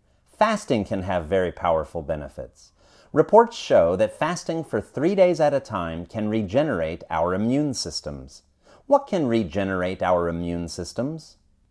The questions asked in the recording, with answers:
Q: What can regenerate our immune systems?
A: Fasting for 3 days can regenerate our immune systems.